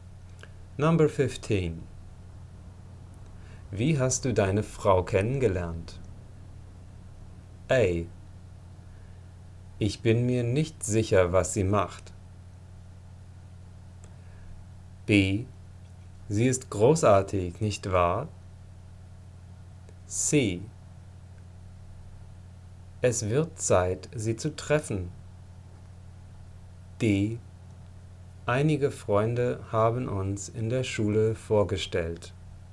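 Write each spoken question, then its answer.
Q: Wie hast du deine Frau kennengelernt?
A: D: Einige Freunde haben uns in der Schule vorgestellt.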